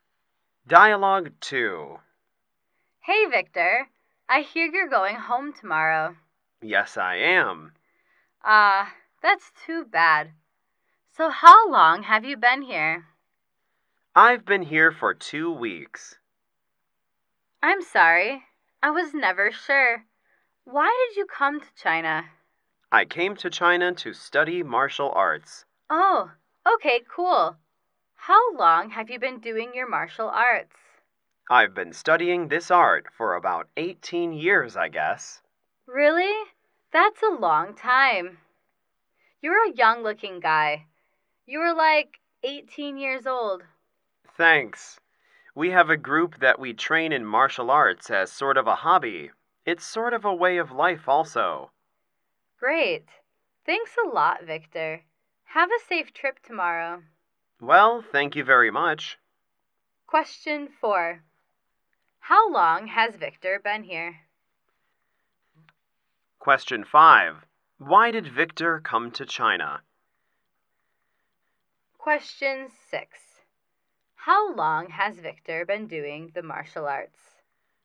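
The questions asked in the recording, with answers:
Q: How long has Victor been here?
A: 2 weeks

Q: Why did Victor come to China?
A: To study martial arts

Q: How long has Victor been doing the martial arts?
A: About 18 years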